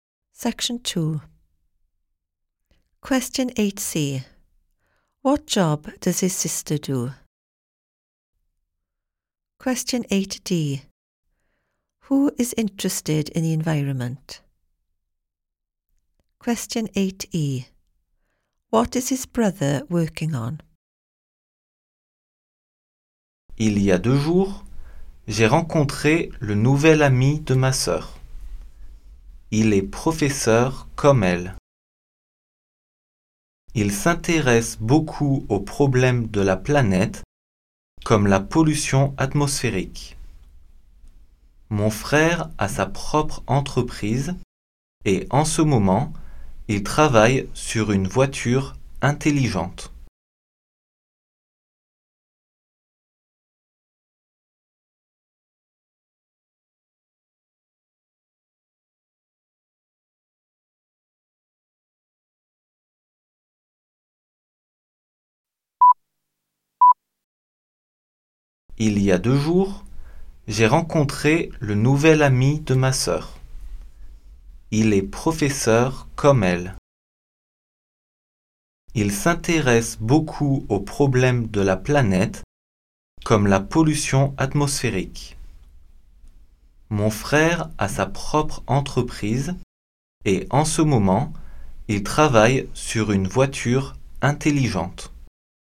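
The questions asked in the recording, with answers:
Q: What job does his sister do?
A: Teacher

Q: Who is interested in the environment?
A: His sister's new boyfriend

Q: What is his brother working on?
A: An intelligent car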